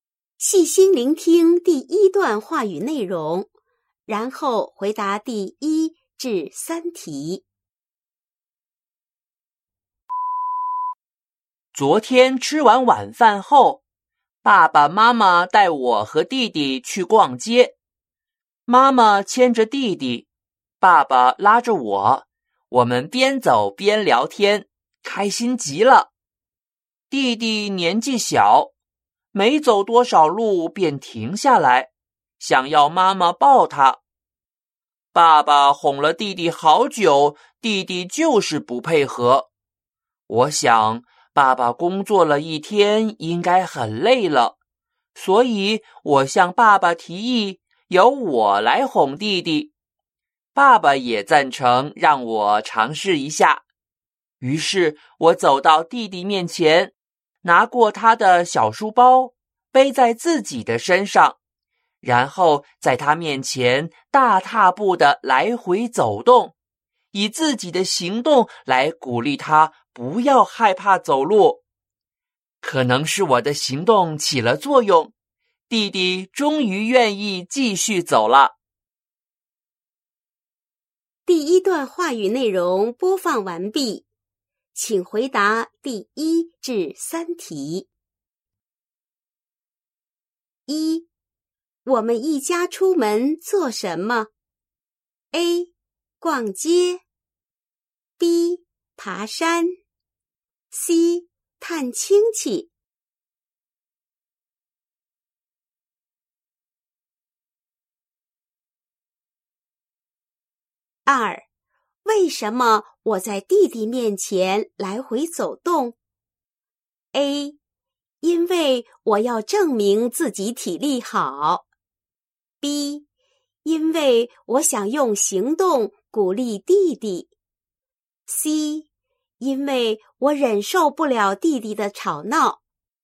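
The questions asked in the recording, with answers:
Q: 我们一家出门做什么?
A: A: 逛街

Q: 为什么我在弟弟面前来回走动?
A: B: 因为我想用行动鼓励弟弟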